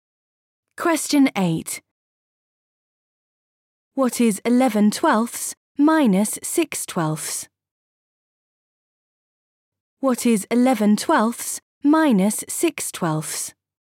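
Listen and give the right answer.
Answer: 5/12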